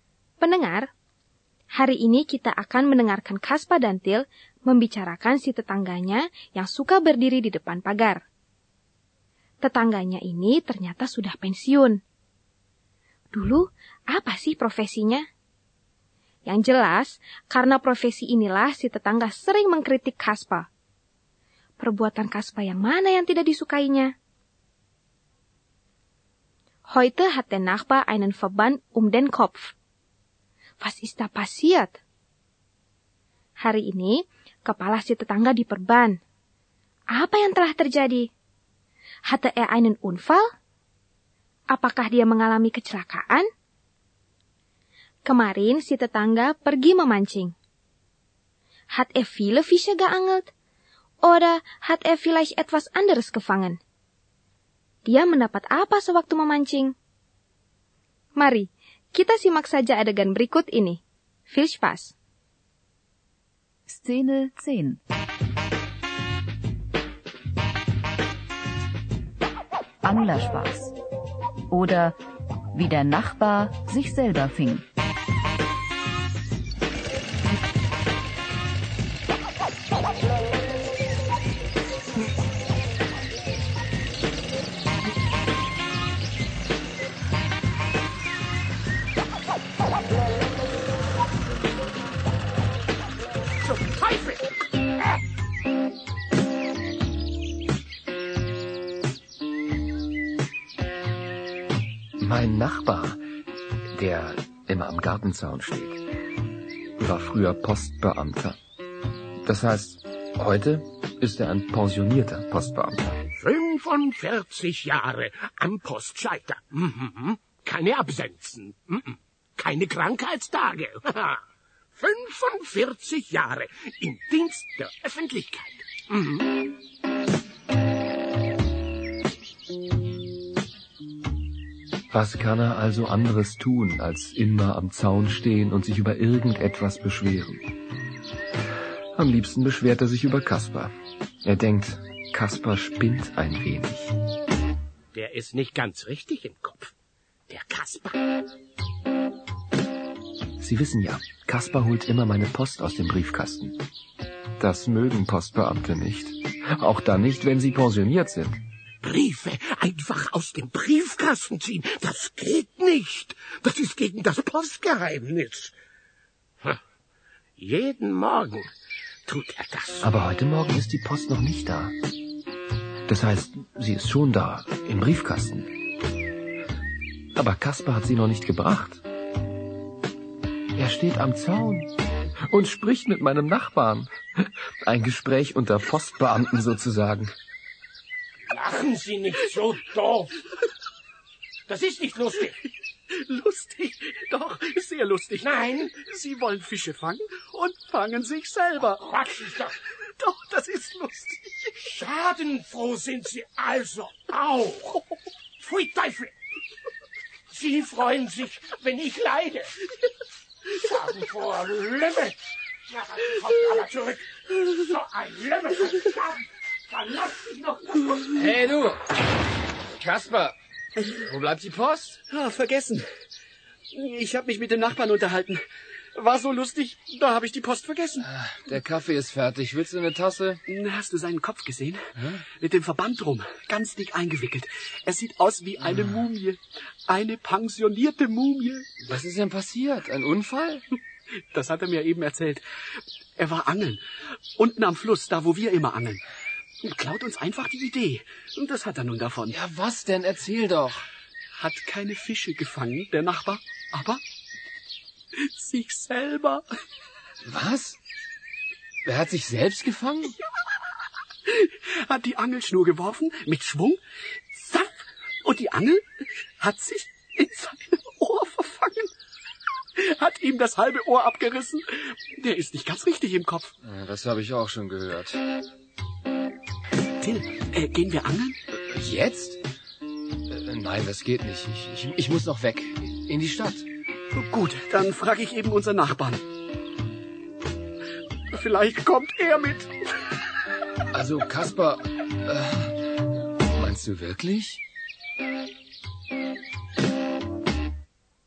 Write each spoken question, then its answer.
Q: Dulu, apa sih profesinya?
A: Ya, Ewa Post Beamter. dan dia bangga sekali.

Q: Perbuatan Kaspa yang mana yang tidak disukainya?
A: Kaspa suka mengambilkan surat-suratnya Til dari kotak pos yang ada di depan rumahnya.

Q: Apa yang telah terjadi? Hatte er einen Unfall?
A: Ternyata dia mengalami kecelakaan waktu memancing.

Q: Dia mendapat apa sewaktu memancing?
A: Er hat sich selbst gefangen.